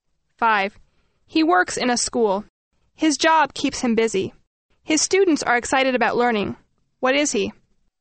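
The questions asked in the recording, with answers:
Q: What is he?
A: A teacher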